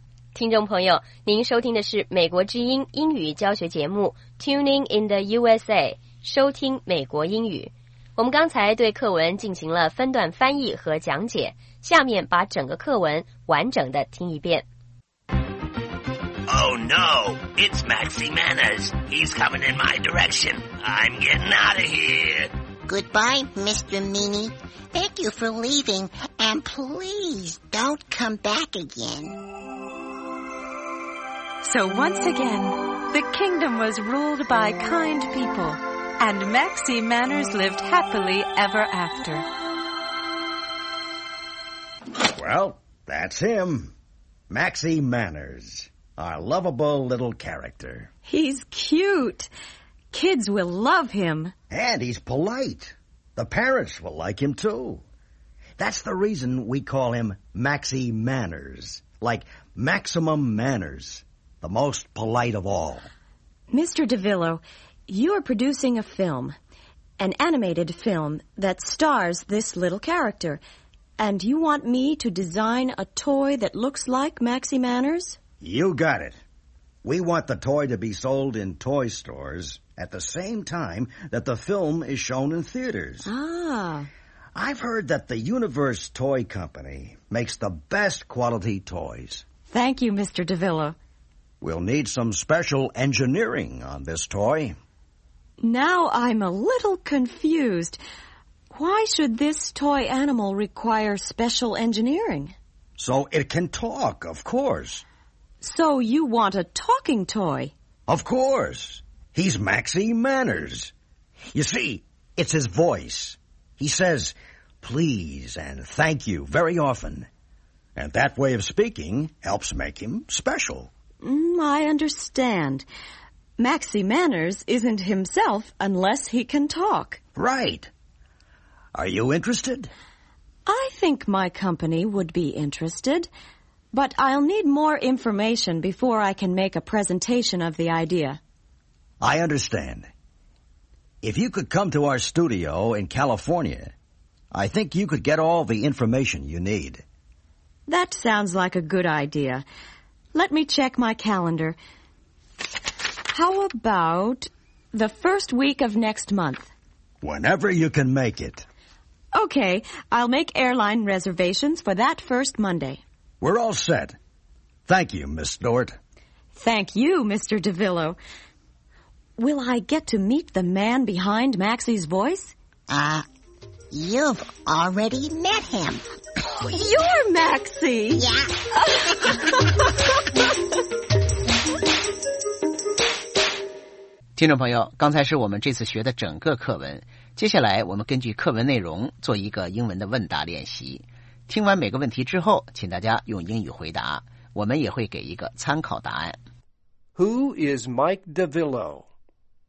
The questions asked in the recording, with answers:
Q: Who is Mike DeVillo?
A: He is a film producer.